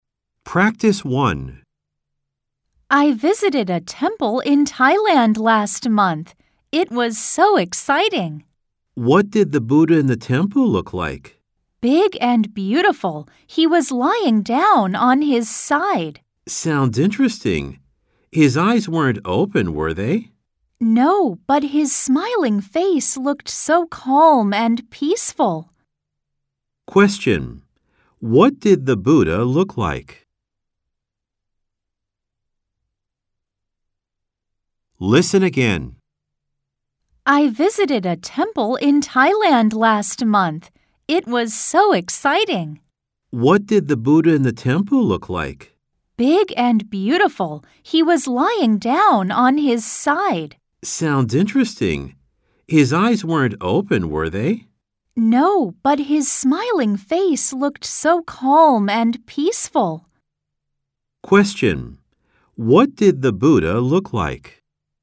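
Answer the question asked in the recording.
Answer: Big and beautiful, lying down on his side with his eyes closed and a calm, smiling face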